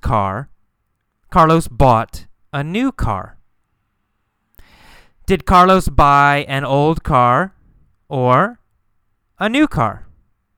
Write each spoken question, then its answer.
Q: Did Carlos buy an old car or a new car?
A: A new car. Carlos bought a new car.